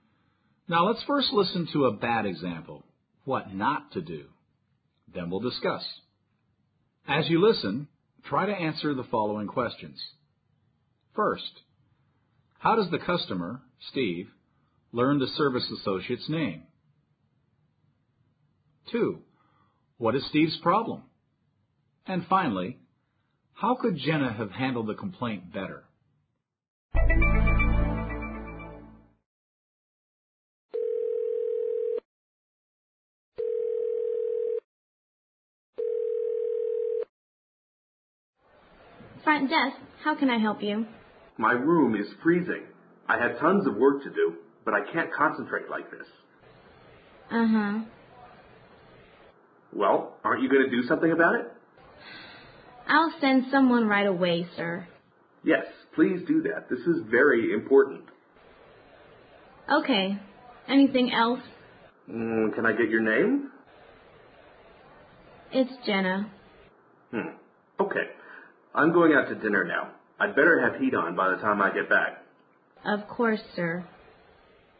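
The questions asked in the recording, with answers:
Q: First, how does the customer, Steve, learn the service associate's name?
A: He asks her for her name.

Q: what is Steve's problem?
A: His room is freezing, so he can't concentrate on his work.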